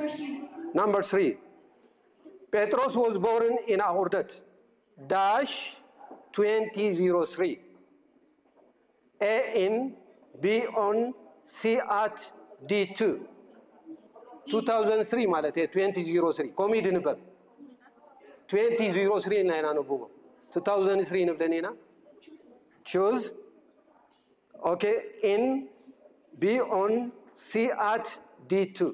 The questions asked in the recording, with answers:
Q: Petros was born in Ahurdat.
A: A in.